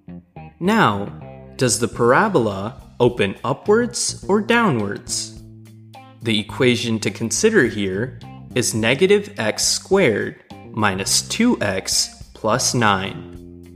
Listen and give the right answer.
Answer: The parabola opens downwards